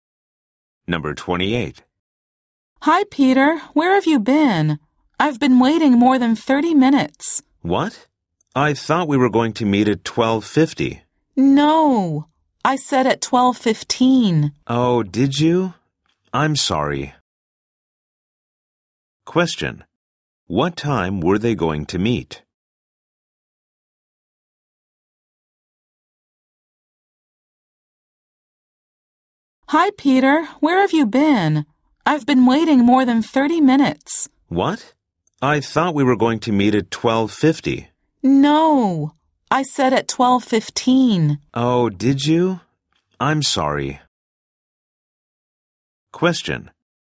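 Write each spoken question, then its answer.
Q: What time were they going to meet?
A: 12:15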